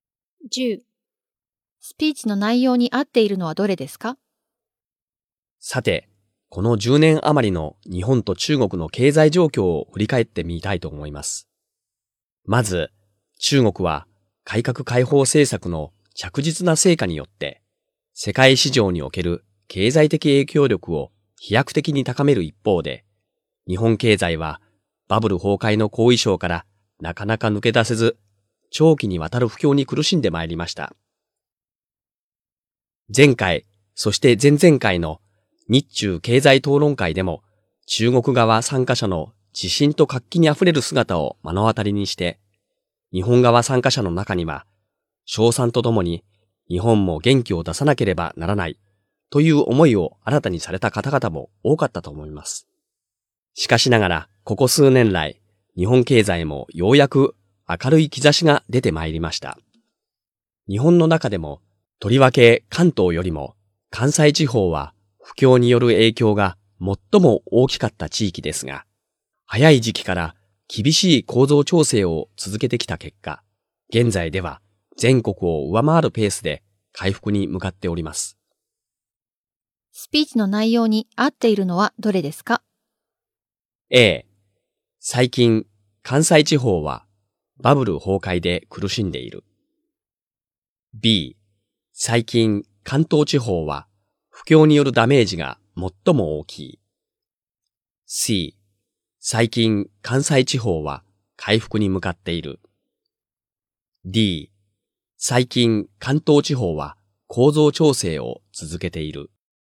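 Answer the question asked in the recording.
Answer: C: 最近、関西地方は回復に向かっている。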